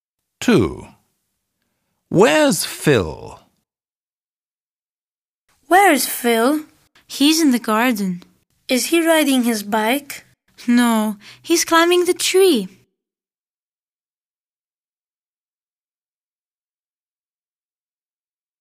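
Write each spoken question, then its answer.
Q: Where's Phil?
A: In the garden, climbing the tree.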